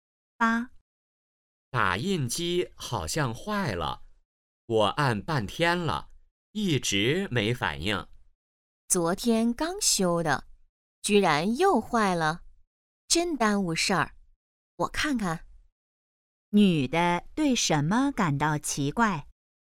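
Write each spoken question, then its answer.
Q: 女的对什么感到奇怪?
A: 打印机昨天刚修又坏了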